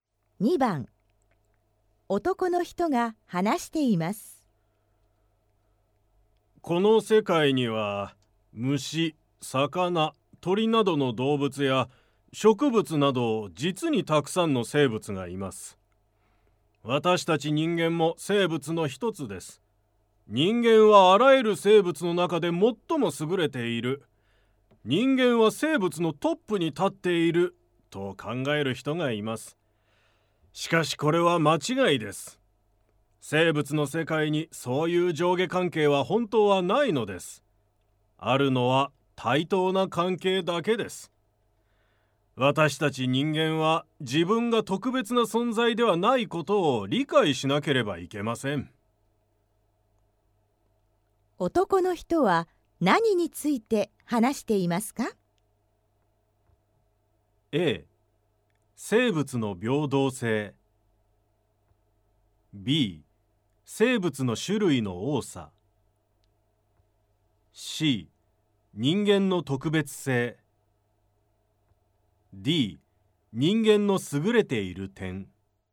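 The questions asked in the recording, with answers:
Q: 男の人は何について話していますか?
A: A: 生物の平等性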